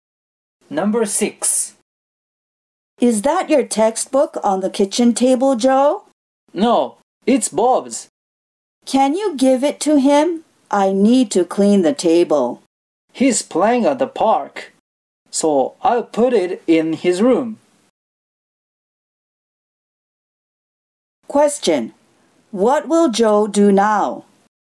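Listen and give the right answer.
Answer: He will put Bob's textbook in Bob's room.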